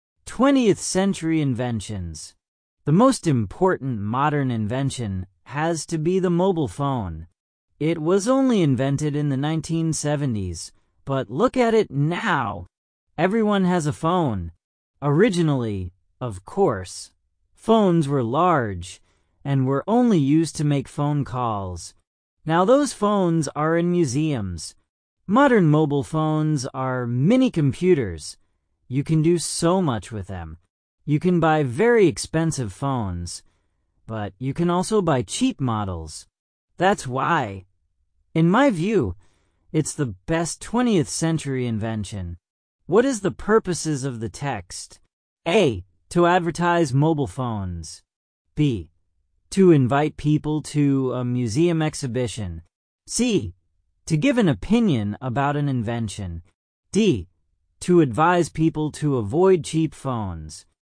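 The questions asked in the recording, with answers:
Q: What is the purposes of the text?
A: C: To give an opinion about an invention.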